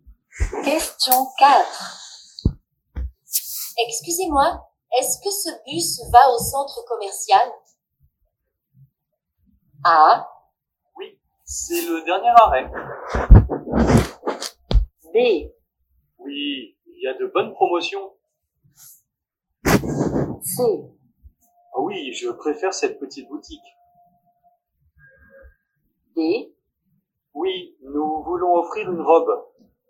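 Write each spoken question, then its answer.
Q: Excusez-moi, est-ce que ce bus va au centre commercial?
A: A: Oui, c'est le dernier arrêt.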